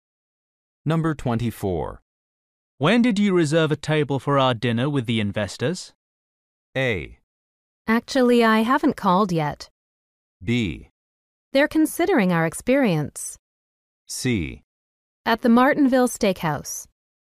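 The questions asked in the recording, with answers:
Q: When did you reserve a table for our dinner with the investors?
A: A: Actually, I haven't called yet.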